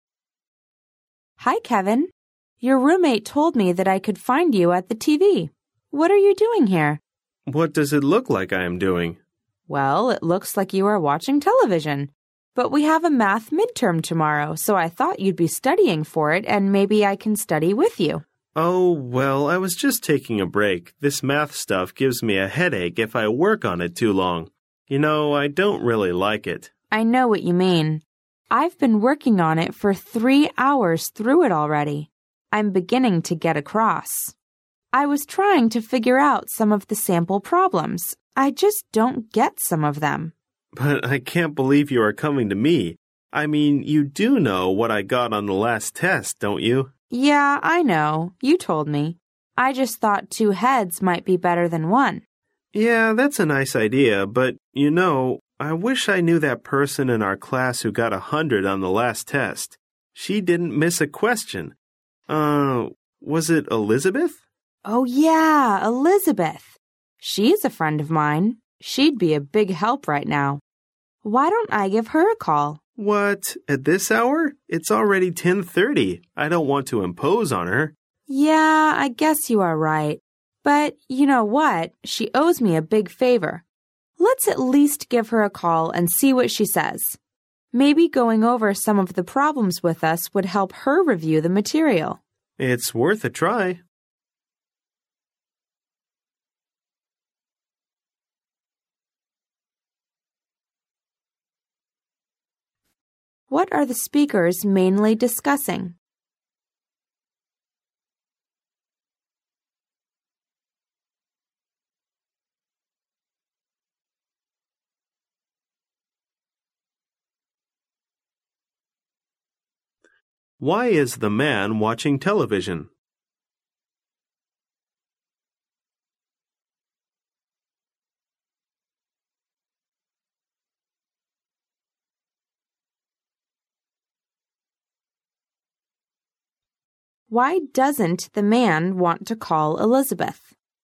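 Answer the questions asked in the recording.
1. Studying for tomorrow's math midterm and getting help with it
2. He is taking a break from studying math
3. It is late (10:30) and he doesn't want to impose on her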